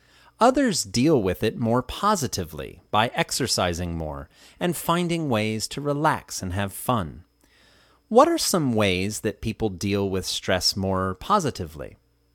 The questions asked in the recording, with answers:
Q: What are some ways that people deal with stress more positively?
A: They exercise more and find ways to relax and have fun.